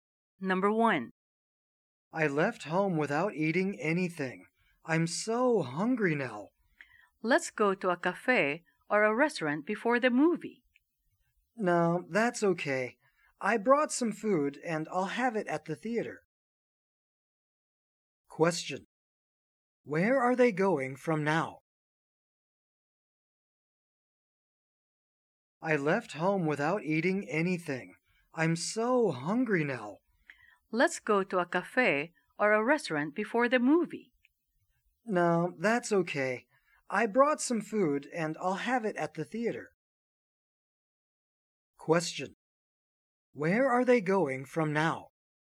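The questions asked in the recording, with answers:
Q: Where are they going from now?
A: To the movie theater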